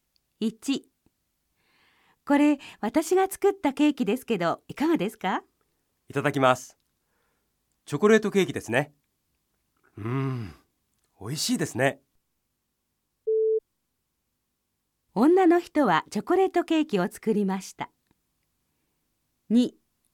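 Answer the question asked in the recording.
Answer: ○(正しい)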